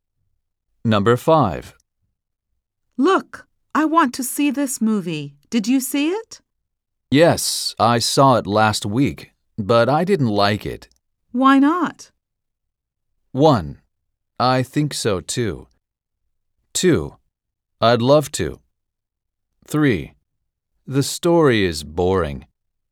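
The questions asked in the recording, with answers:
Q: Why not?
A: 3: The story is boring.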